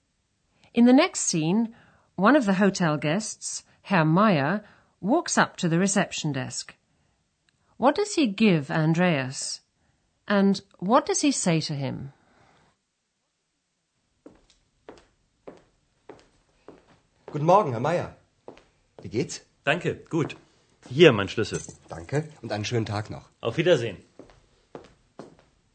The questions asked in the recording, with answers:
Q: What does he give Andreas?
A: Herr Meyer puts his key on the counter

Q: And what does he say to him?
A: says to Andreas, Here's my key.